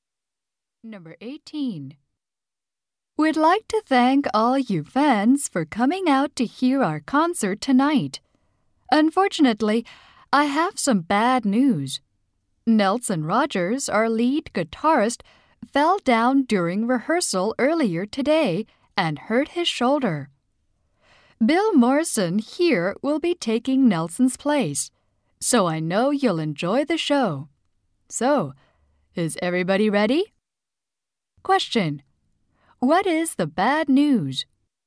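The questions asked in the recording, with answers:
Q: What is the bad news?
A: The lead guitarist hurt his shoulder.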